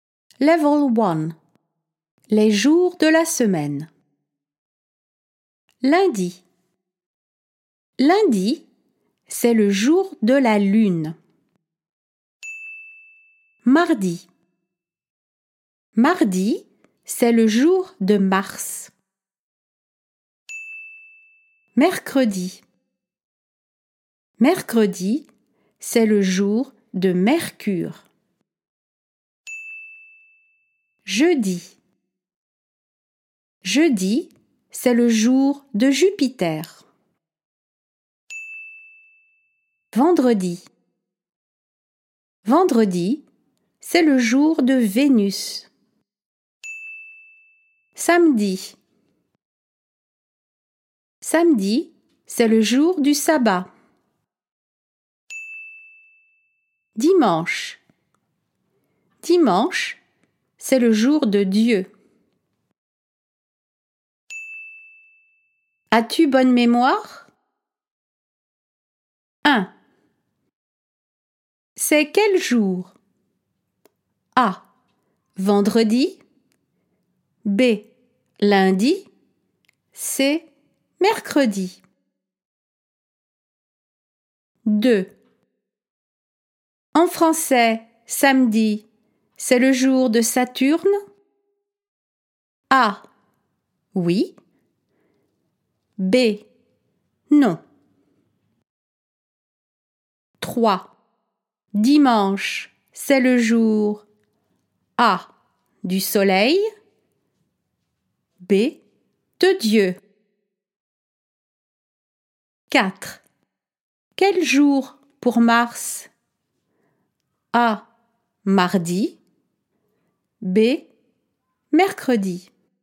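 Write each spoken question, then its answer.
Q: En français, samedi, c'est le jour de Saturne?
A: B: Non

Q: Dimanche, c'est le jour A.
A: B: De Dieu

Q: Quel jour pour Mars?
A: A: Mardi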